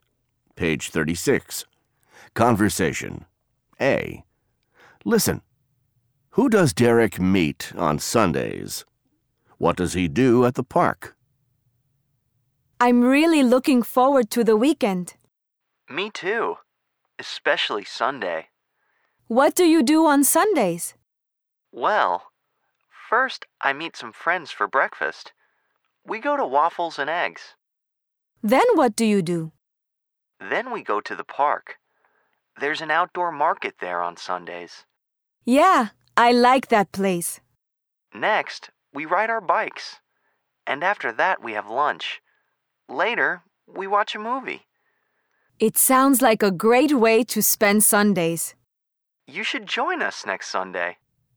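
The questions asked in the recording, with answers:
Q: Who does Derek meet on Sundays?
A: Some friends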